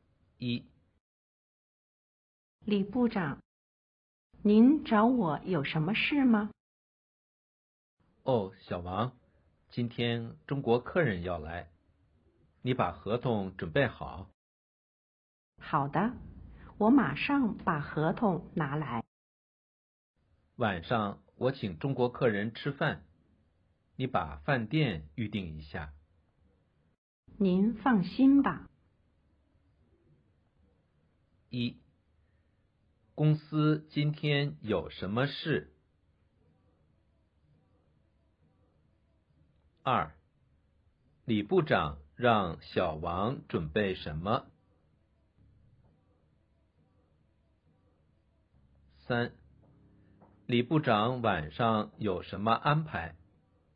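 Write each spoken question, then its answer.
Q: 公司今天有什么事?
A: 中国客人要来

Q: 李部长让小王准备什么?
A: 合同

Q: 李部长晚上有什么安排?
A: 请中国客人吃饭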